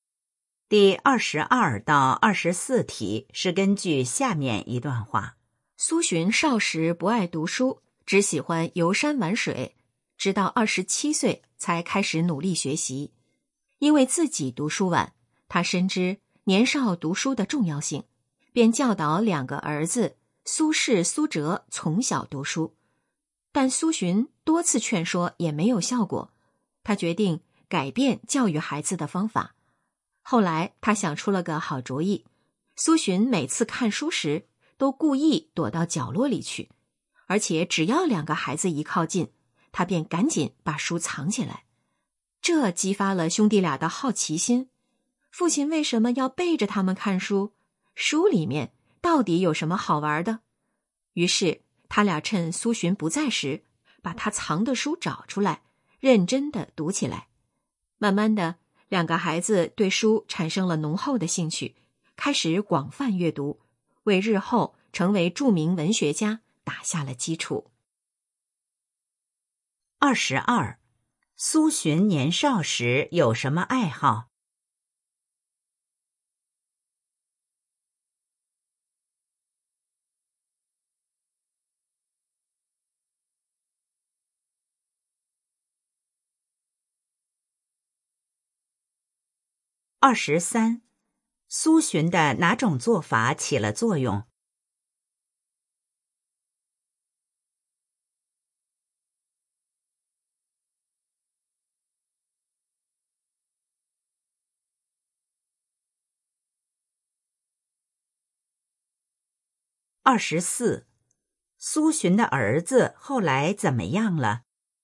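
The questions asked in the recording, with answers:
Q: 苏洵年少时有什么爱好?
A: 游山玩水

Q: 苏洵的哪种做法起了作用?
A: 故意躲着孩子看书、把书藏起来

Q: 苏洵的儿子后来怎么样了?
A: 成为著名文学家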